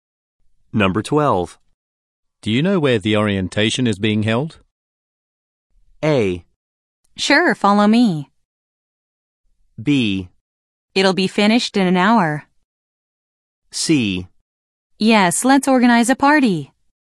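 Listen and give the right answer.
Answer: A: Sure, follow me.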